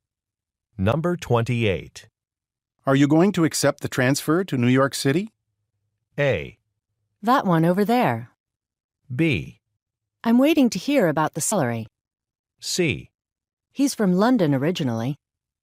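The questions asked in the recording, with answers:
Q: Are you going to accept the transfer to New York City?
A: B: I'm waiting to hear about the salary.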